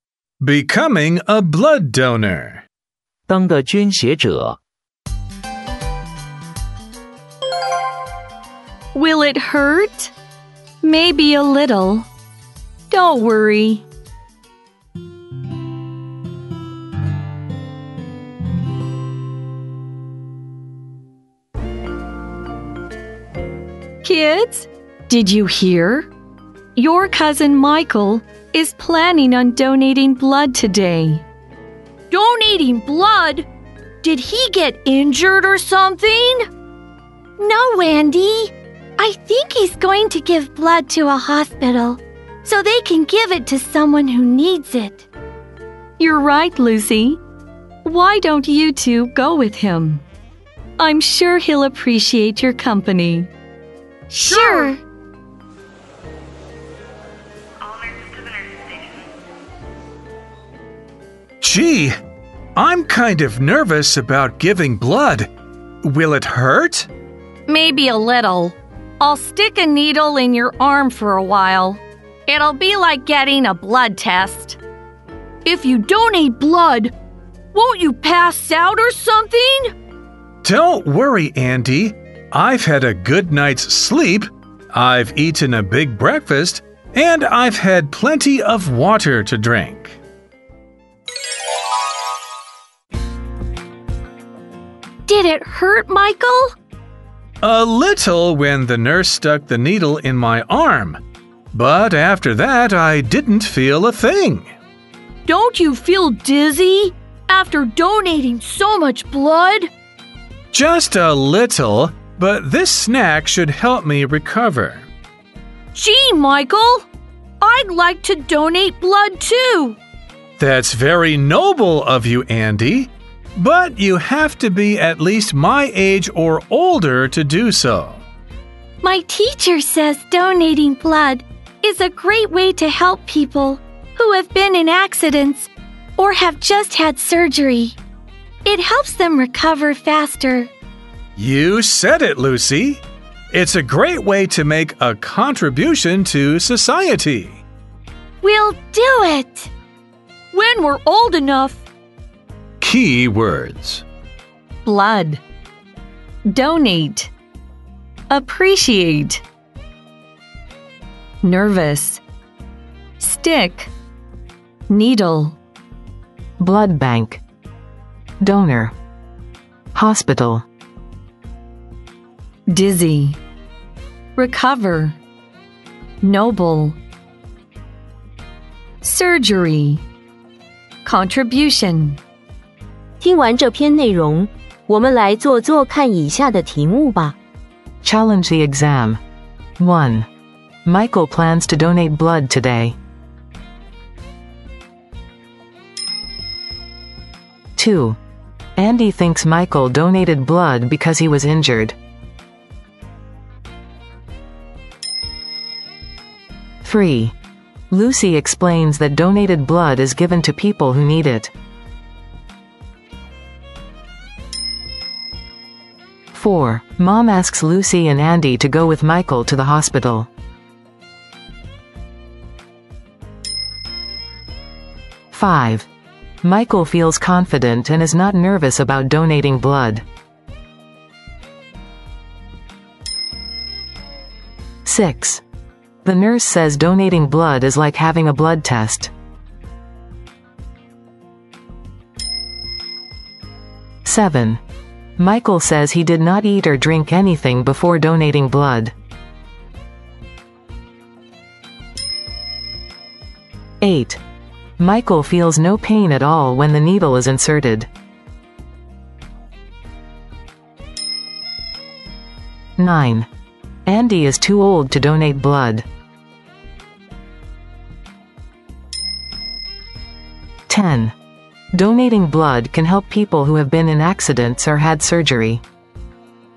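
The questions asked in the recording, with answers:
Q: Michael plans to donate blood today.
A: True

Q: Lucy explains that donated blood is given to people who need it.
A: True

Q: Mom asks Lucy and Andy to go with Michael to the hospital.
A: True

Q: Michael feels confident and is not nervous about donating blood.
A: False

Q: The nurse says donating blood is like having a blood test.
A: True

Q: Michael says he did not eat or drink anything before donating blood.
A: False

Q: Michael feels no pain at all when the needle is inserted.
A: False

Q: Andy is too old to donate blood.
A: False

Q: Donating blood can help people who have been in accidents or had surgery.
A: True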